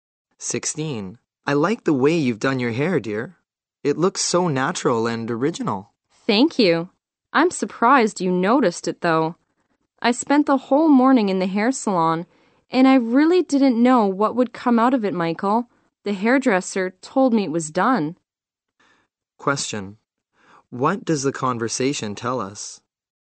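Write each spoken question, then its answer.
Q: What does the conversation tell us?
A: The woman had her hair done at a salon, and the man likes it.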